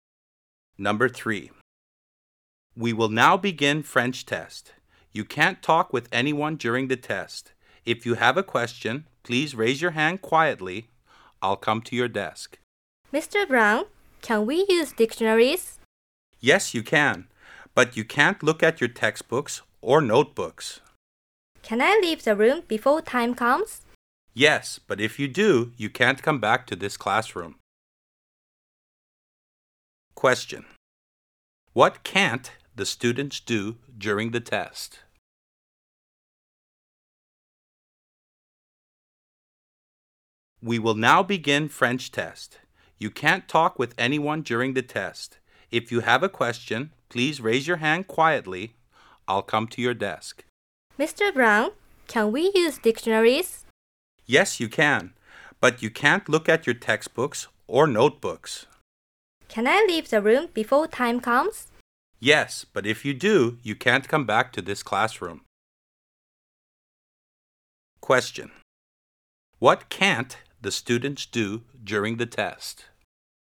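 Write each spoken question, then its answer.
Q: Question. What can't the students do during the test?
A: Talk with anyone or look at their textbooks or notebooks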